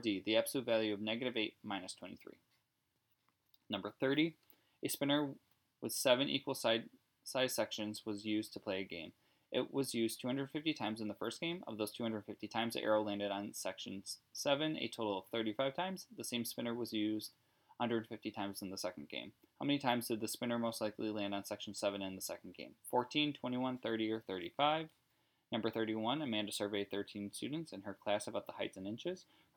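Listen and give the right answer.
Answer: 21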